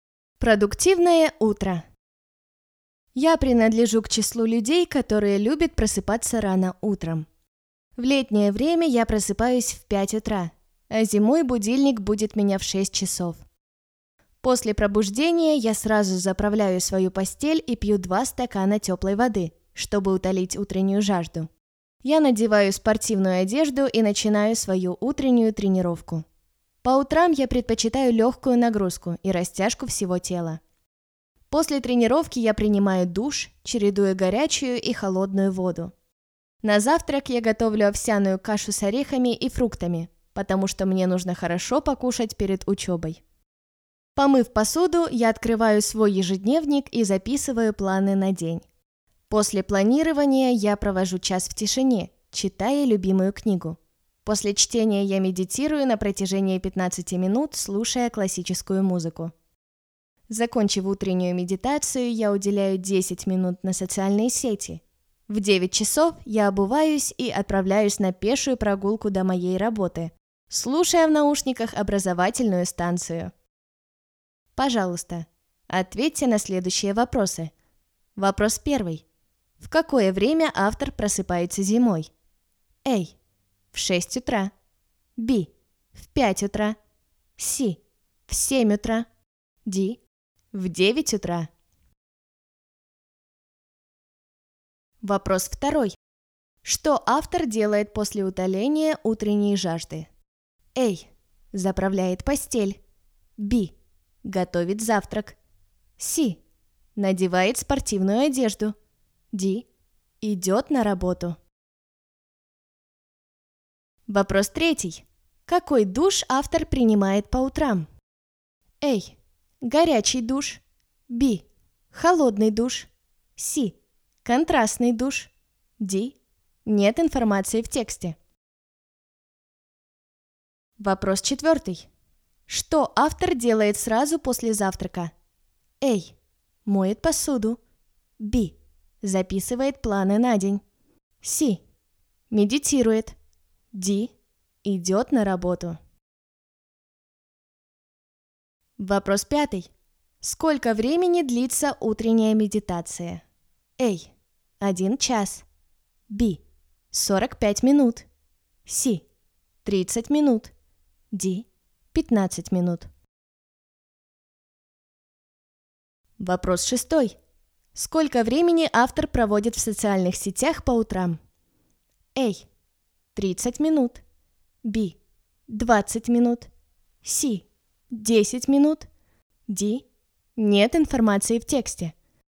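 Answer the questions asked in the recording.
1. A: В 6 утра.
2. C: Надевает спортивную одежду.
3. C: Контрастный душ.
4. A: Моет посуду.
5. D: 15 минут.
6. C: 10 минут.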